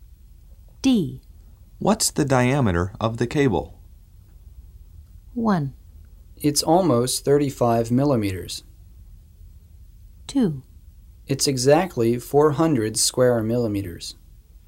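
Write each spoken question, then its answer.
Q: What's the diameter of the cable?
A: 1: It's almost 35 millimeters.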